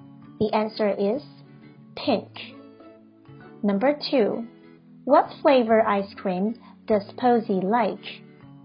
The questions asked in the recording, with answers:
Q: What flavor ice cream does Posey like?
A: Strawberry.